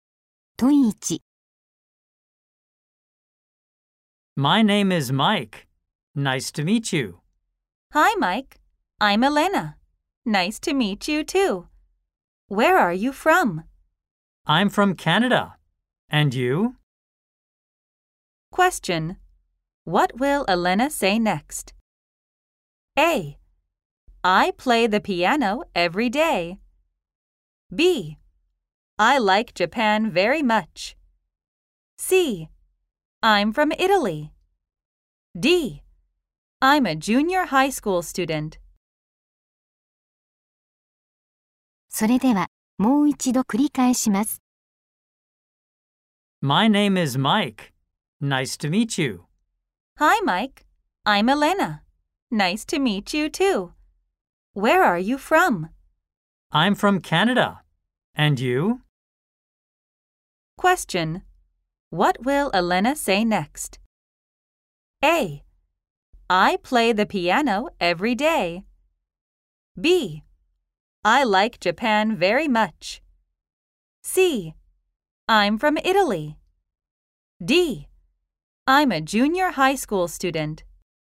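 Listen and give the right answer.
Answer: C: I'm from Italy.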